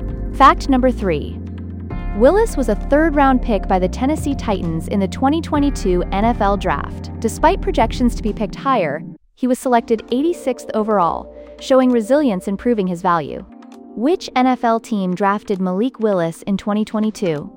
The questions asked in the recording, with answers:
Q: Which NFL team drafted Malik Willis in 2022?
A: Correct answer, Tennessee Titans.